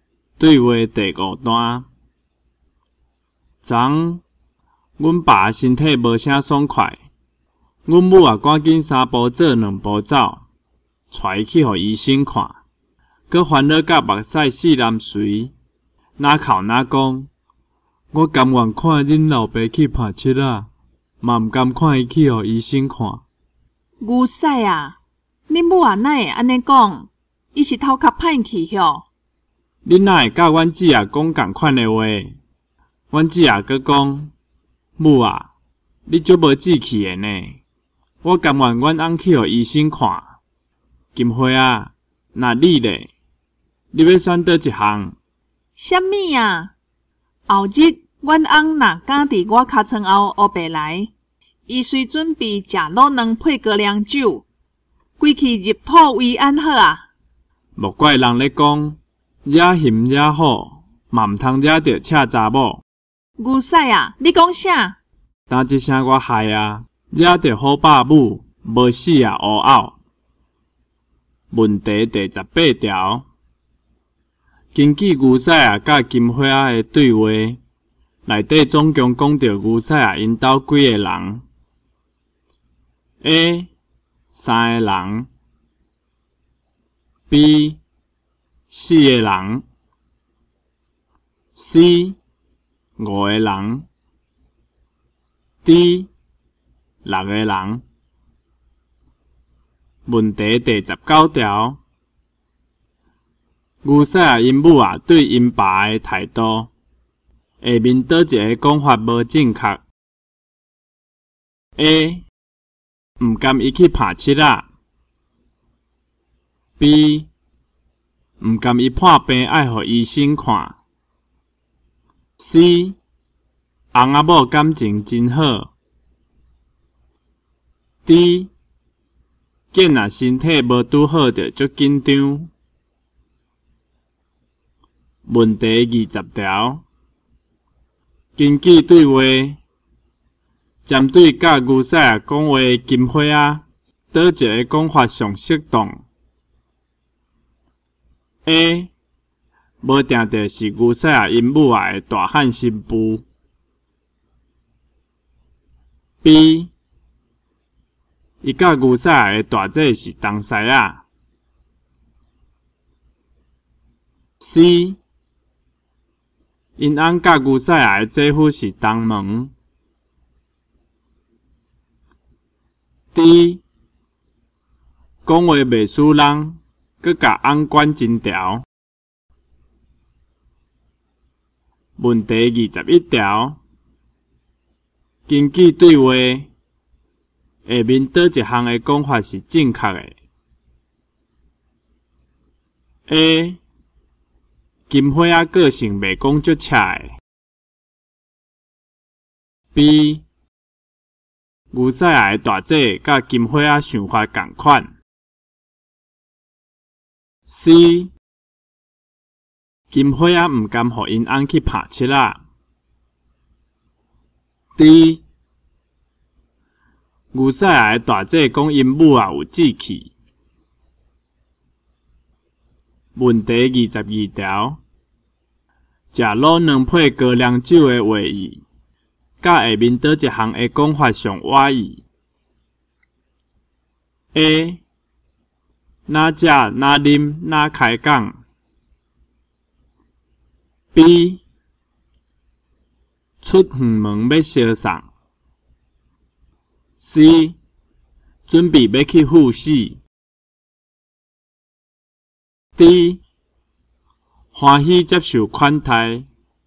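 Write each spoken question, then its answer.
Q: 食卤蛋配高粱酒的话语,甲下面倒一项的讲法上歪意。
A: C: 准备要去赴死。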